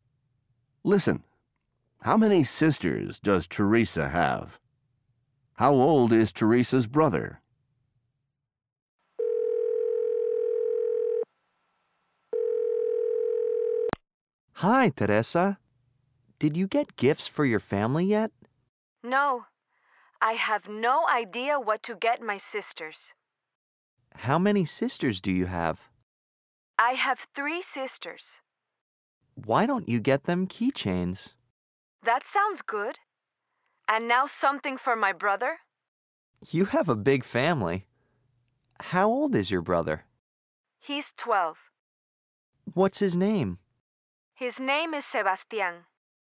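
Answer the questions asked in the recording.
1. Three
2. 12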